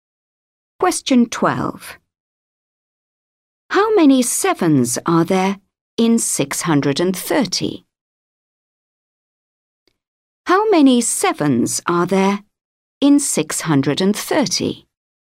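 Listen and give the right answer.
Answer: 90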